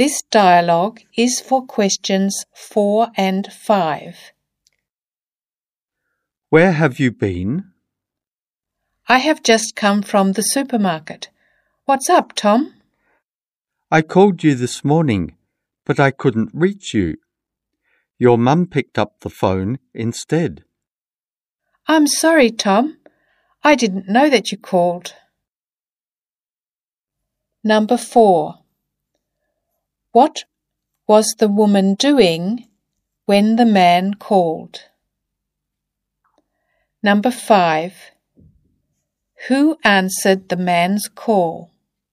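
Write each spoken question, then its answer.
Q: Who answered the man's call?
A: The woman's mum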